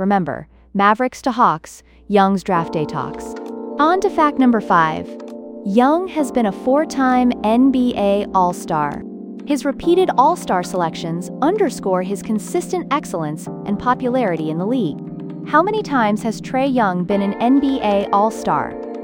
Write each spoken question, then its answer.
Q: How many times has Trae Young been an NBA All-Star?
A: Correct answer, 4 times.